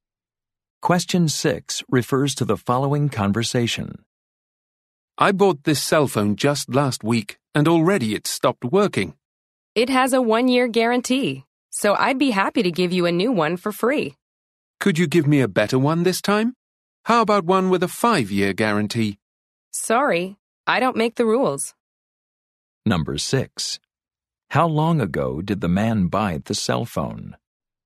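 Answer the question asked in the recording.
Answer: Last week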